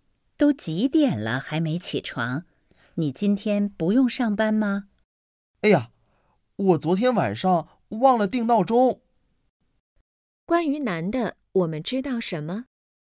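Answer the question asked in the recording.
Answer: 忘了定闹钟,起晚了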